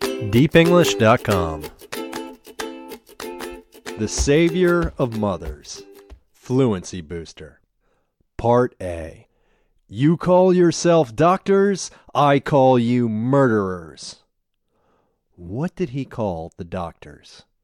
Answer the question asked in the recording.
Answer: He called the doctors murderers.